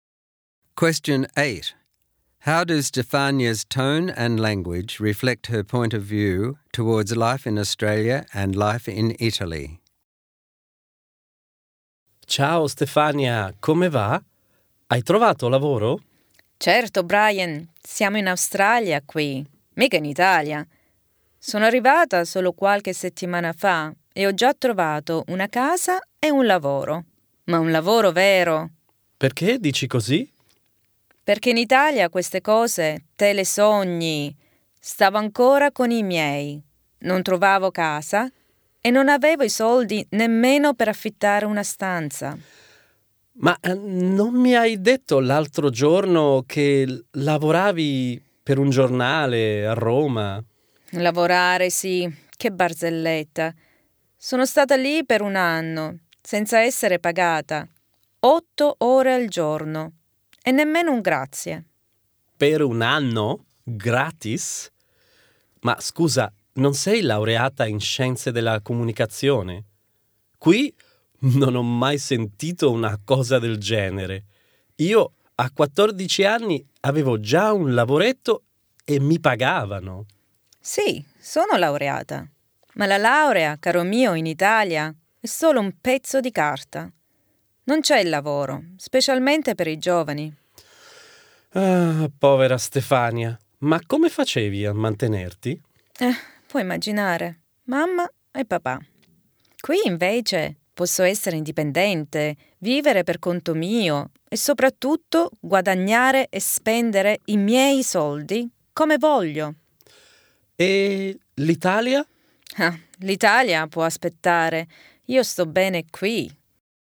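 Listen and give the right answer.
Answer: She is sarcastic and bitter about Italy ("Che barzelletta", a degree is "solo un pezzo di carta", no work and unpaid jobs) but positive and enthusiastic about Australia, where she has found a real job, a home and independence.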